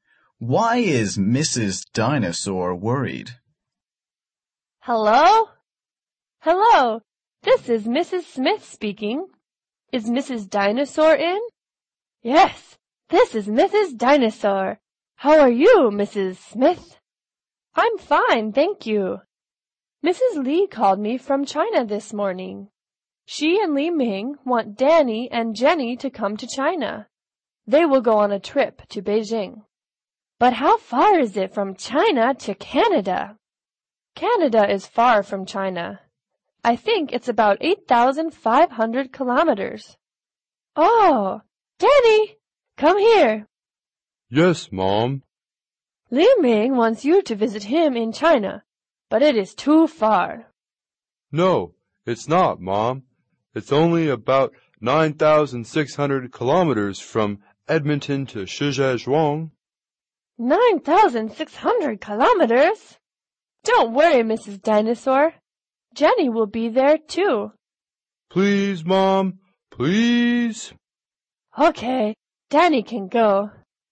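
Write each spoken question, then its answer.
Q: Why is Mrs. Dinosaur worried?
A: Because China is too far away for Danny to visit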